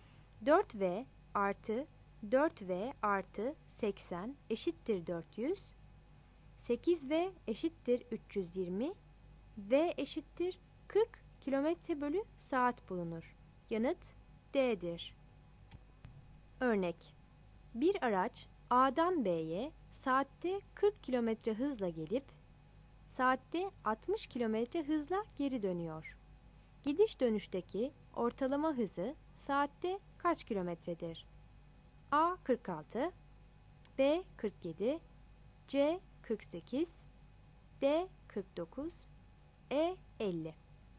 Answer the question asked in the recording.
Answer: Yanıt C'dir.